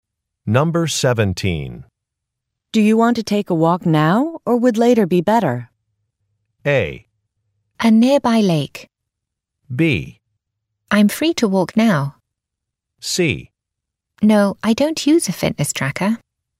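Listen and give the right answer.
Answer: B: I'm free to walk now.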